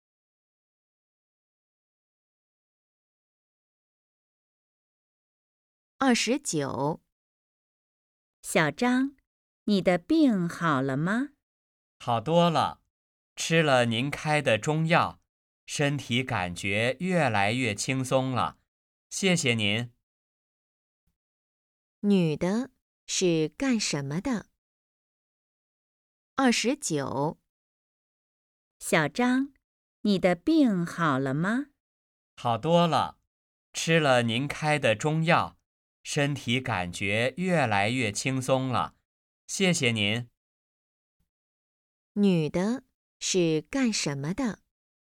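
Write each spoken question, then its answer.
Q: 女的是干什么的?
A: 医生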